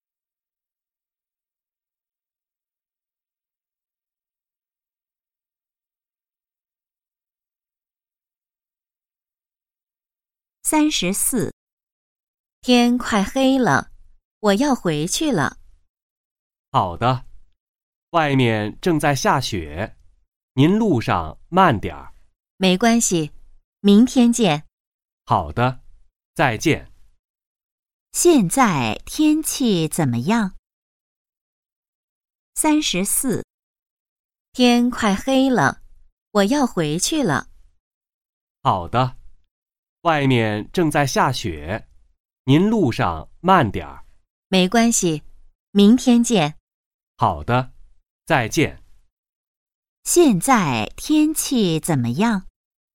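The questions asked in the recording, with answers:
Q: 现在天气怎么样?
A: 正在下雪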